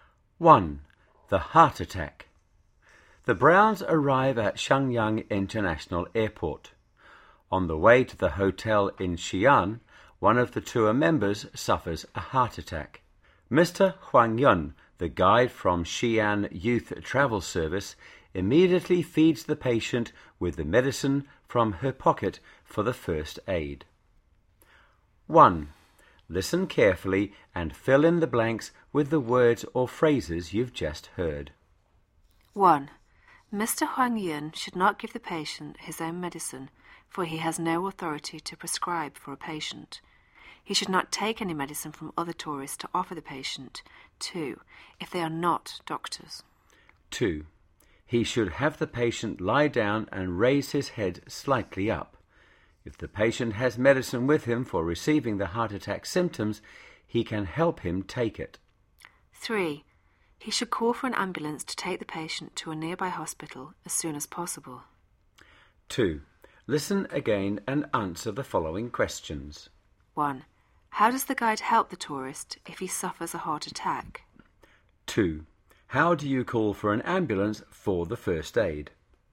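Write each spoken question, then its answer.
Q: How does the guide help the tourist if he suffers a heart attack?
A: Have the patient lie down with his head slightly raised, help him take his own heart medicine if he has it, and call an ambulance to take him to a nearby hospital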